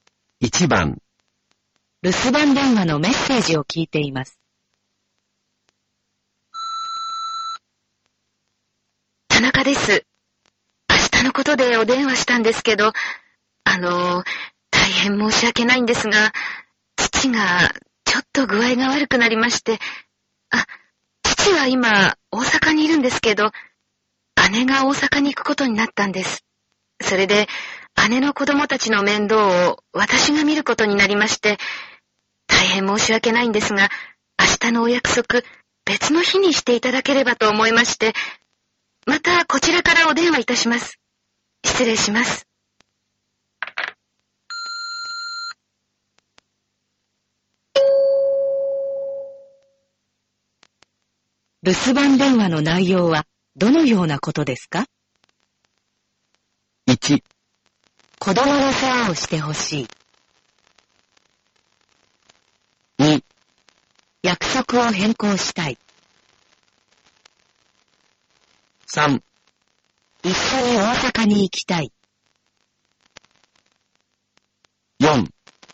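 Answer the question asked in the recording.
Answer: 2: 約束を変更したい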